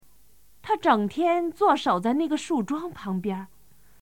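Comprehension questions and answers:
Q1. 他整天坐守在那个树桩〇〇儿,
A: 旁边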